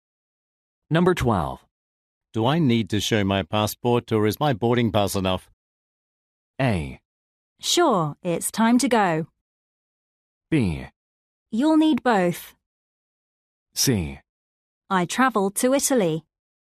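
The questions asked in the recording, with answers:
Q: Do I need to show my passport or is my boarding pass enough?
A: B: You'll need both.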